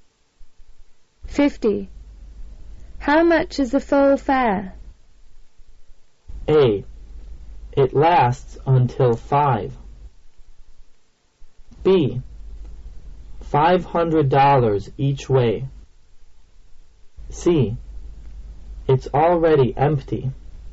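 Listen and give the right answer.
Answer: B: $500 each way.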